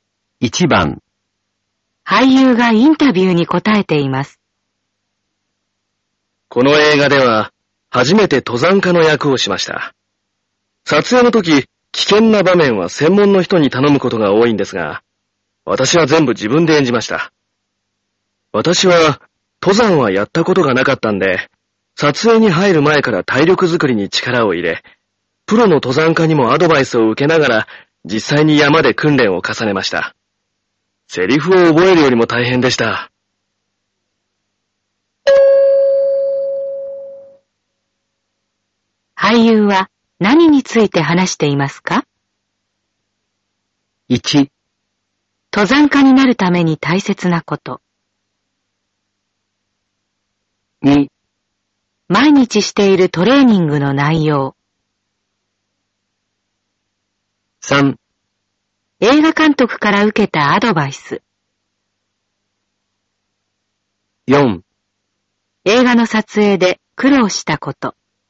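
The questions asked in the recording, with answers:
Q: 俳優は何について話していますか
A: 4: 映画の撮影で苦労したこと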